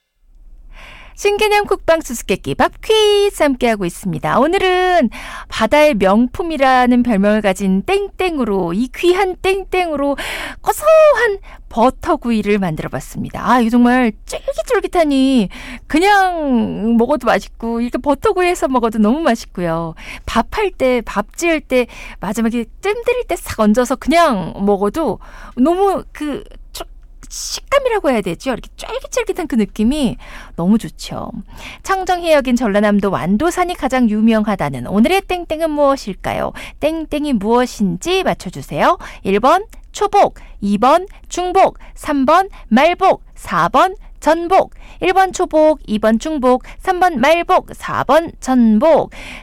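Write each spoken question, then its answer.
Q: 청정해역인 전라남도 완도산이 가장 유명하다는 오늘의 땡땡은 무엇일까요?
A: 4: 전복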